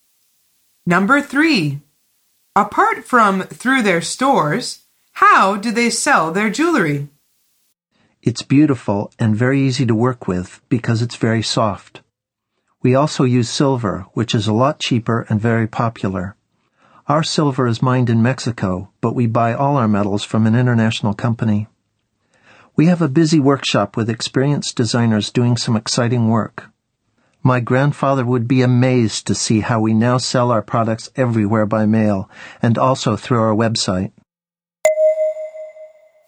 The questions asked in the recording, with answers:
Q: Apart from through their stores, how do they sell their jewelry?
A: The answer is by mail and through their website.